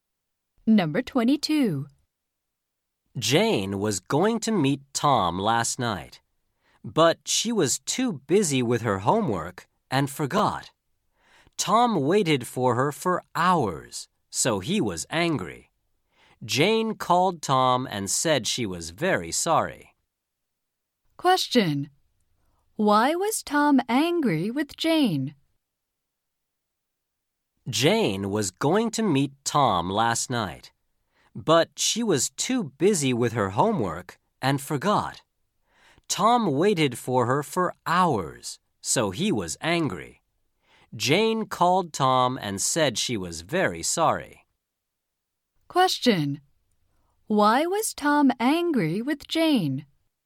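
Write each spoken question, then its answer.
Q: Why was Tom angry with Jane?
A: She forgot to meet him and he waited for hours.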